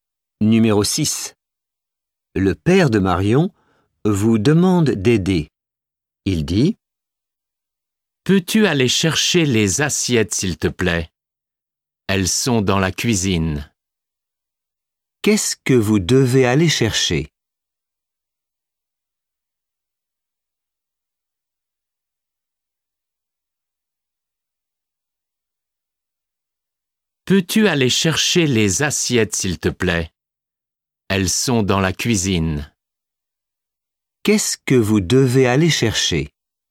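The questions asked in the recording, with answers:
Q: Qu'est-ce que vous devez aller chercher ?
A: Les assiettes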